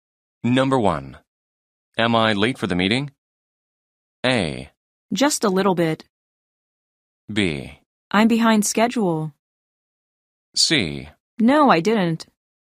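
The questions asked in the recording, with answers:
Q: Am I late for the meeting?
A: A: Just a little bit.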